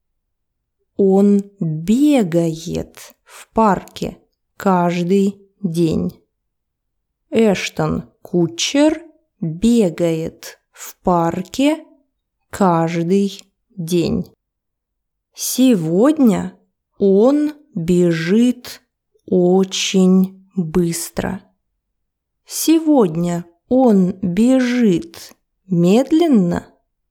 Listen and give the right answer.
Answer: Нет, наоборот. Сегодня он бежит очень быстро.